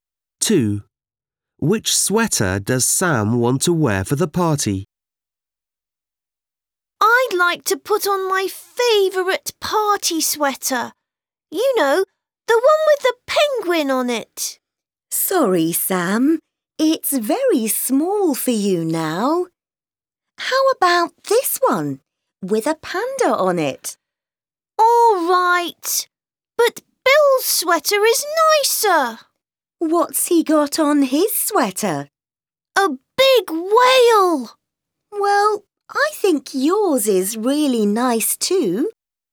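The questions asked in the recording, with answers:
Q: Which sweater does Sam want to wear for the party?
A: The one with a panda on it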